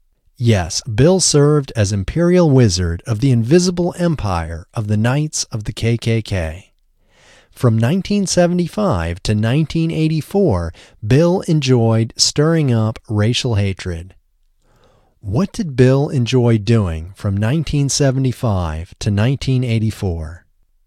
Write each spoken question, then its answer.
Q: What did Bill enjoy doing from 1975 to 1984?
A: Bill enjoyed stirring up racial hatred from 1975 to 1984.